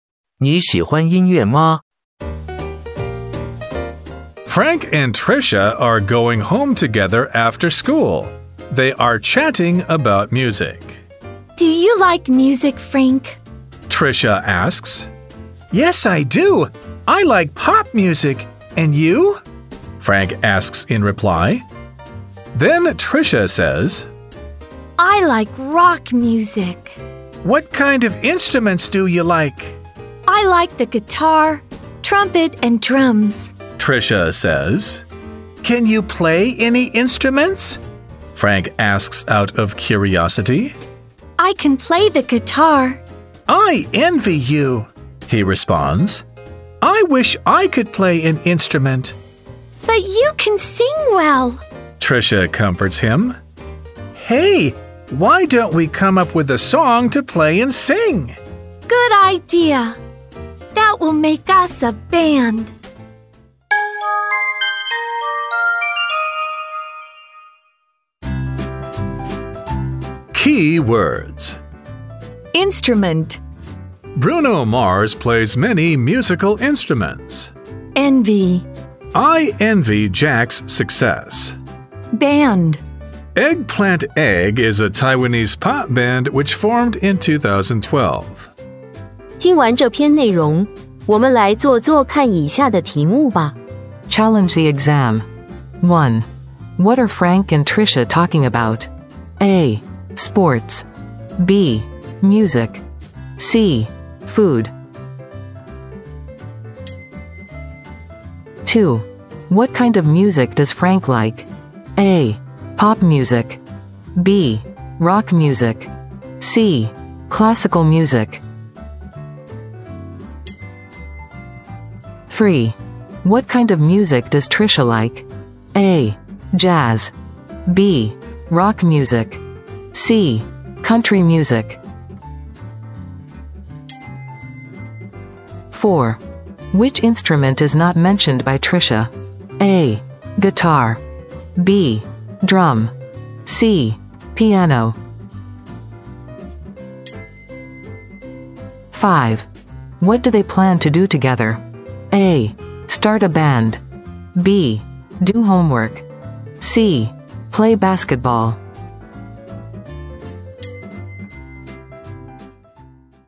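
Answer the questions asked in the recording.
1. B: Music.
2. A: Pop music.
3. B: Rock music.
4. C: Piano.
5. A: Start a band.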